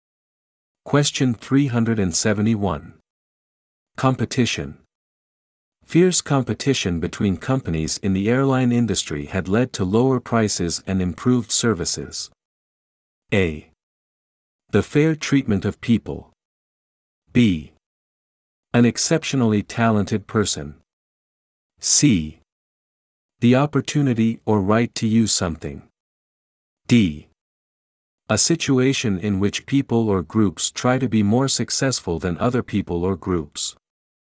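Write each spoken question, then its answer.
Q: Competition.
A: D: A situation in which people or groups try to be more successful than other people or groups.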